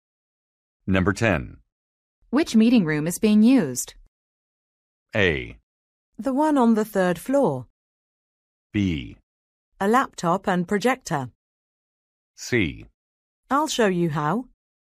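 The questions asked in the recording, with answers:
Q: Which meeting room is being used?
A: A: The one on the third floor.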